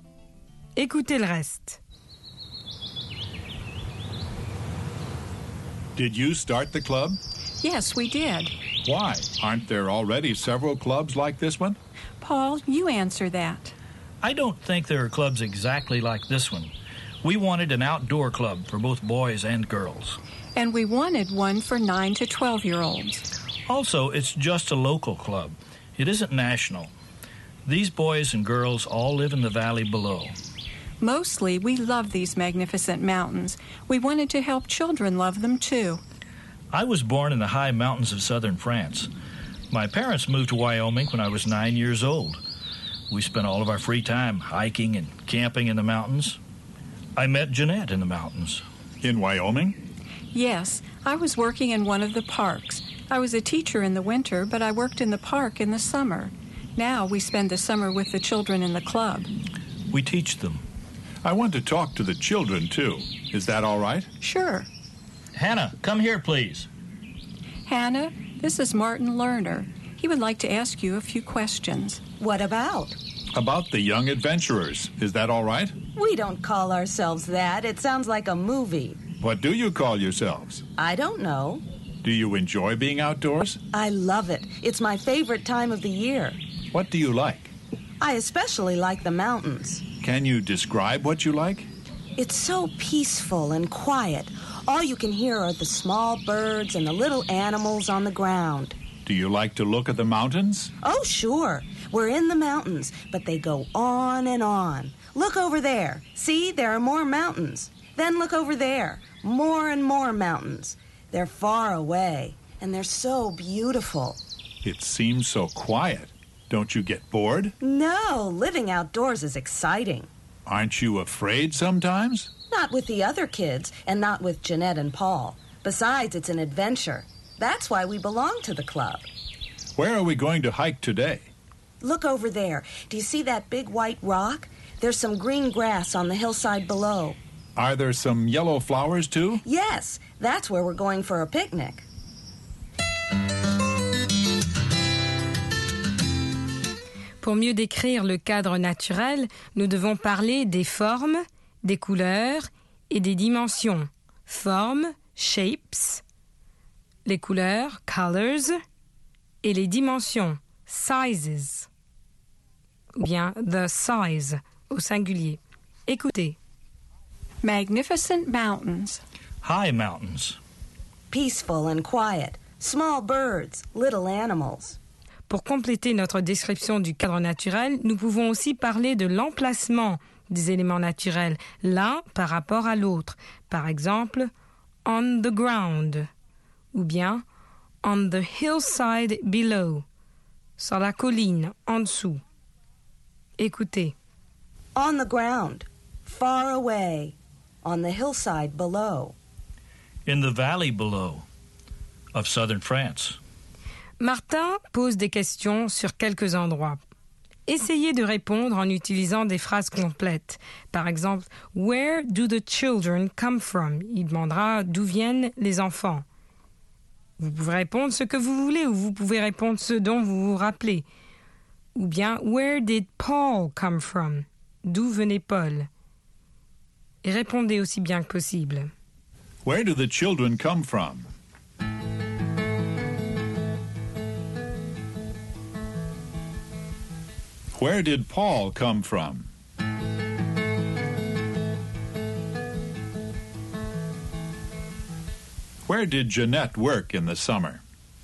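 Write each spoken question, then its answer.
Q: « Where do the children come from ?»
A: From the valley below

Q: Where did Paul come from?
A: From the high mountains of southern France

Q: Where did Jeanette work in the summer?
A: In one of the parks in Wyoming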